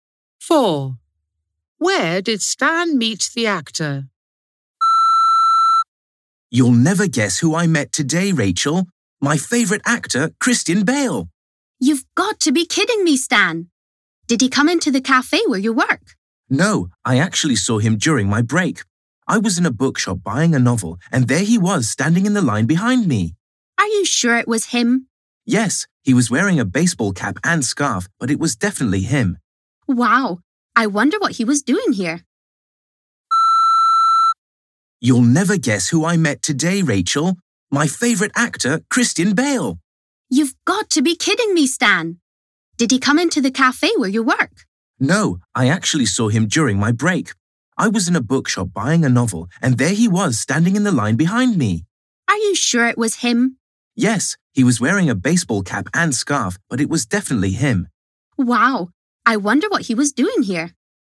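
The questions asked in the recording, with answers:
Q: Where did Stan meet the actor?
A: in a bookshop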